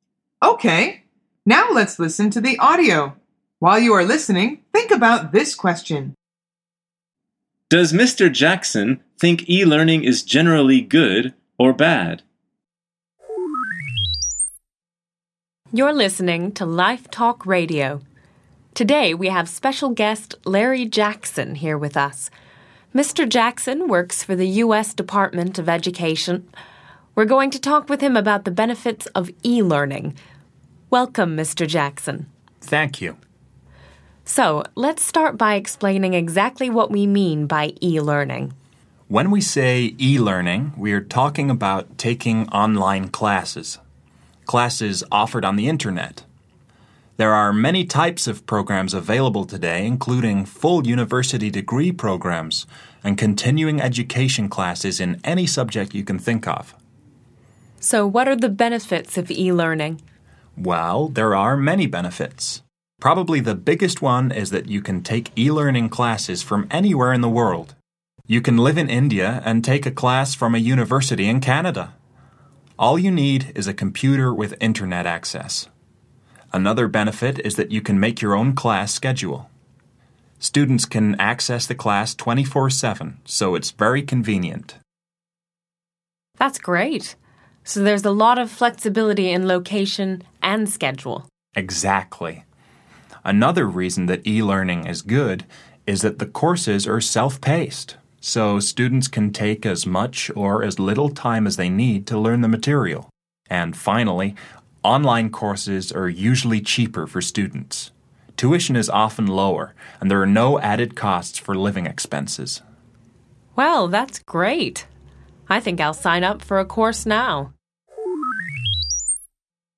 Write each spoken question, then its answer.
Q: Does Mr. Jackson think e-learning is generally good or bad?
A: The answer is good.